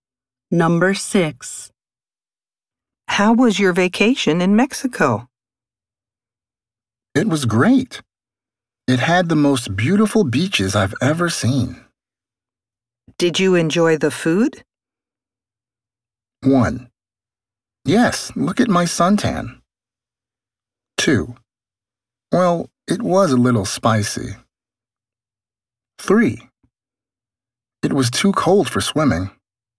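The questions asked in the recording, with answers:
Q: Did you enjoy the food?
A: 2: Well, it was a little spicy.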